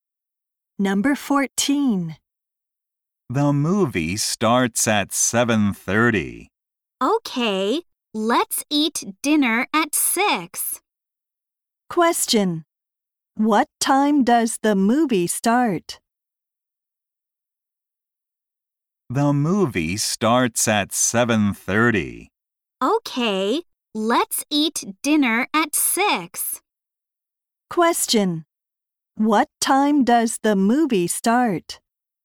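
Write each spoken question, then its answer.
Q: What time does the movie start?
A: At 7:30.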